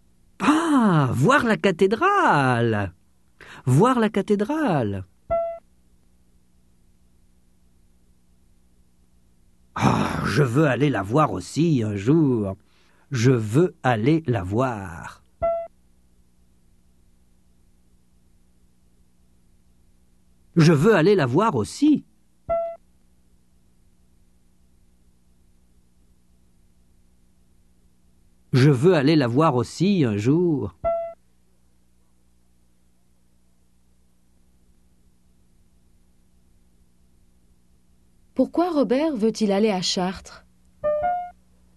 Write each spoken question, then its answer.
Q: Pourquoi Robert veut-il aller à Chartres?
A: Pour voir la cathédrale.